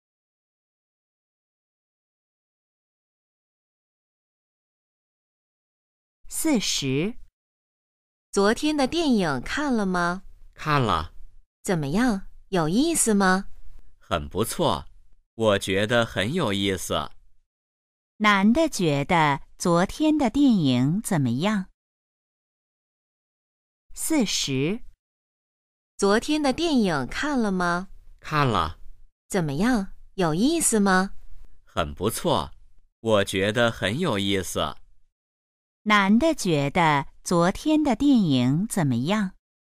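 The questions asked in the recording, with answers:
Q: 男的觉得昨天的电影怎么样?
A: 很有意思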